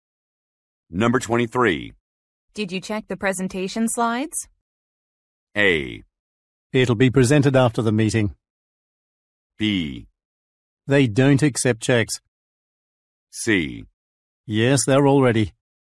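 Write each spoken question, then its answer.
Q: Did you check the presentation slides?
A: C: Yes, they're all ready.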